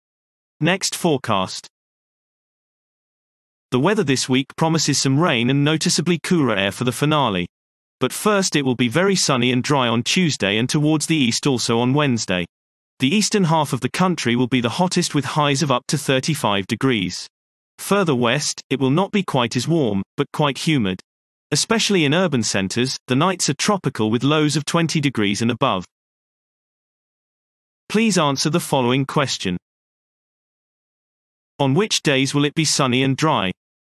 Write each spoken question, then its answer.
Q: On which days will it be sunny and dry?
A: Sunny and dry weather is forecast for Tuesday and Wednesday.